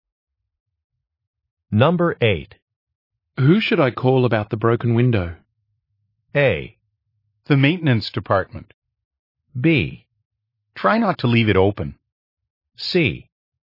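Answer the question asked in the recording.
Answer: A: The maintenance department.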